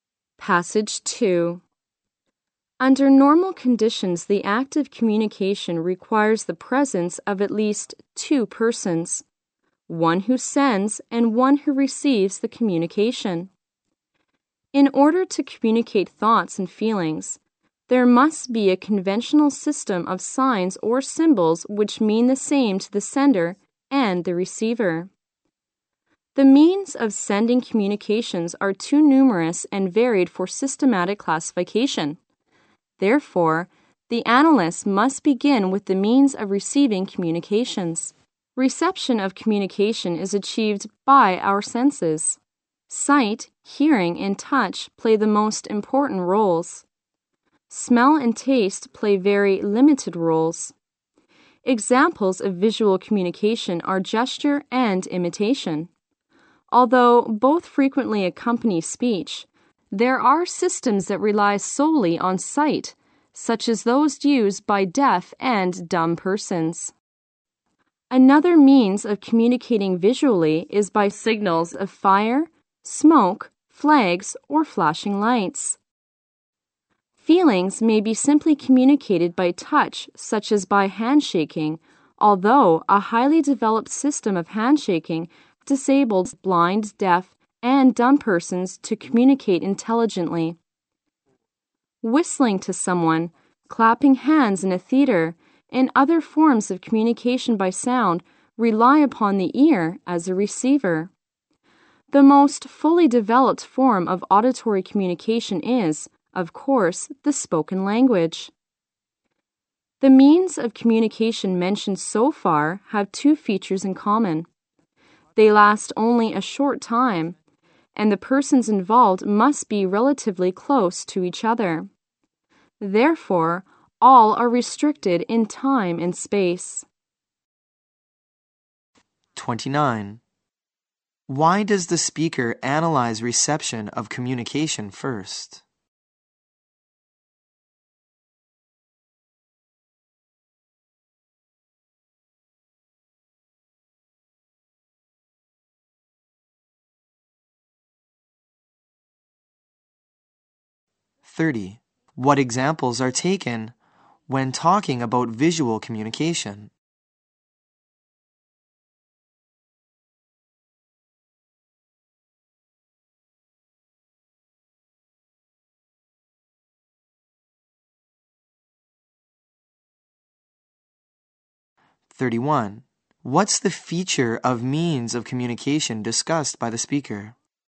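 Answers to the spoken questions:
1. The ways of sending communications are too many and varied to classify systematically.
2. Gesture and imitation
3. They are limited in time and space.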